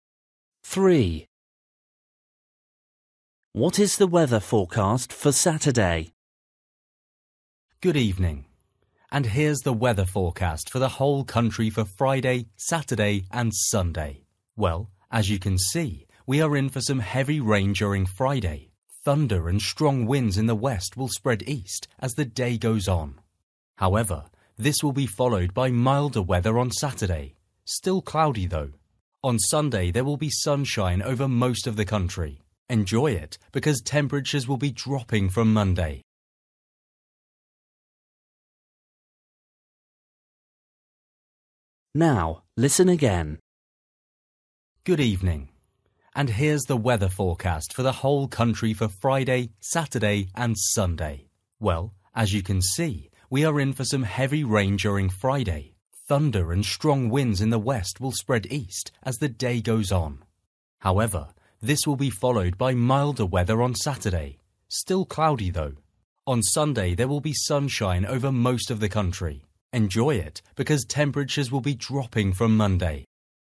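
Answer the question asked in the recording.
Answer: milder but still cloudy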